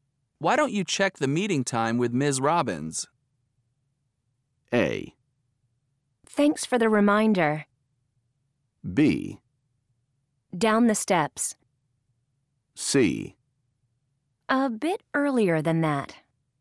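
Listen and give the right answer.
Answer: A: Thanks for the reminder.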